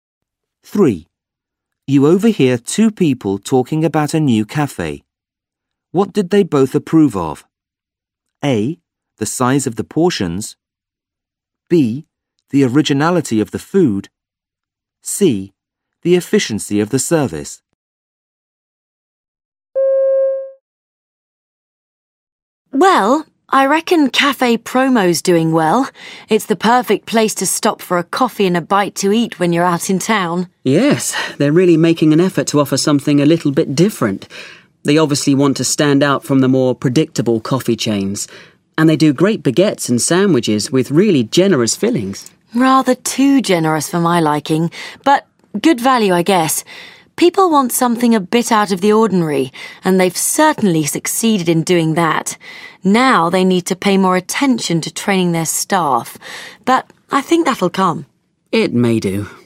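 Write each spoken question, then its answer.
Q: What did they both approve of?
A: B: The originality of the food.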